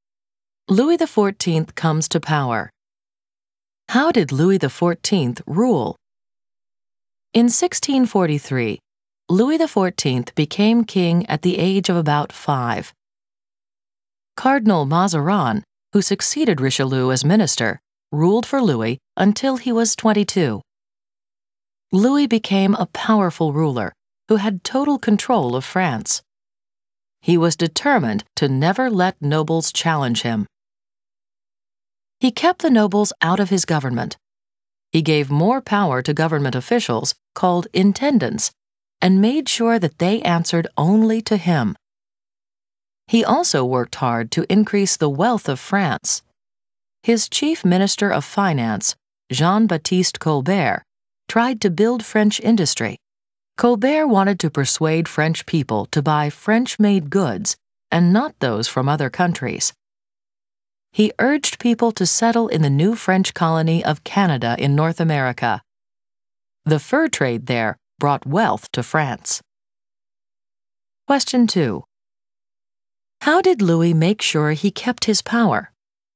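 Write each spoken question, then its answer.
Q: How did Louis make sure he kept his power?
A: He kept the nobles out of his government and gave power to intendants who answered only to him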